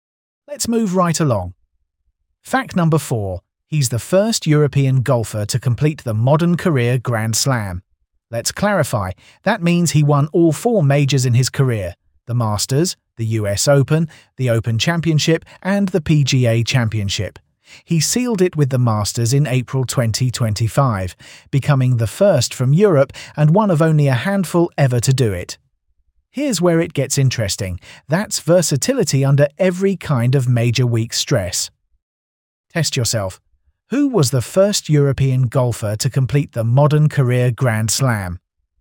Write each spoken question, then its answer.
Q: Who was the first European golfer to complete the modern career Grand Slam?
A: Correct answer, Rory McIlroy.